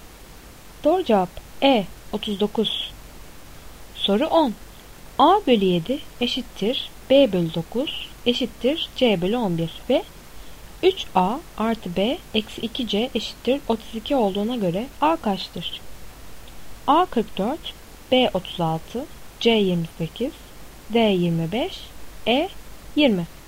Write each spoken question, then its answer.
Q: A bölü 7 eşittir B bölü 9 eşittir C bölü 11 ve 3A artı B eksi 2C eşittir 32 olduğuna göre A kaçtır?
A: Doğru cevap C 28.